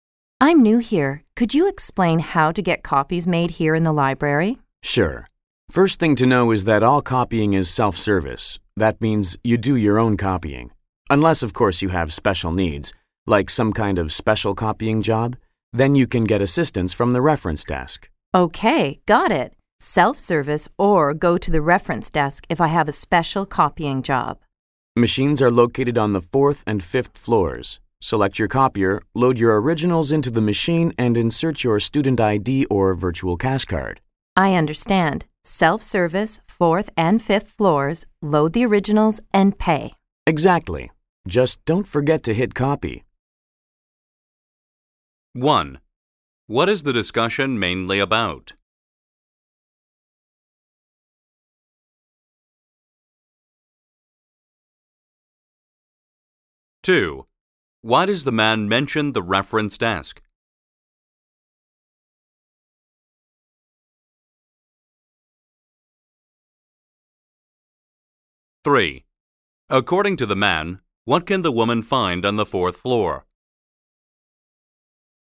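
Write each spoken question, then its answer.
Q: What is the discussion mainly about?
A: How to make copies in the library

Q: Why does the man mention the reference desk?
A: Students with special copying jobs can get help there

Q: According to the man, what can the woman find on the 4th floor?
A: Self-service copy machines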